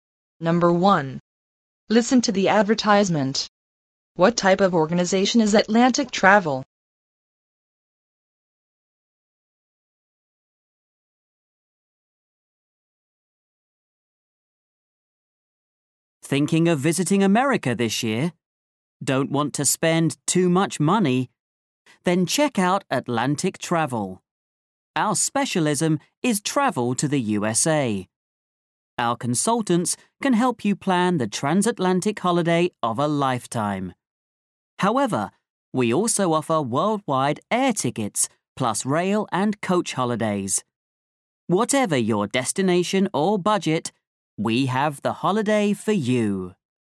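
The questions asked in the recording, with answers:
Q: What type of organization is Atlantic Travel?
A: A travel agency specialising in travel to the USA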